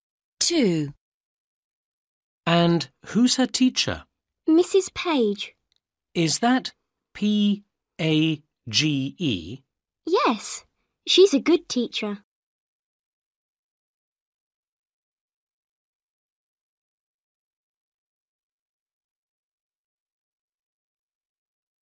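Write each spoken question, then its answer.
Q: And who's her teacher?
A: Mrs. Page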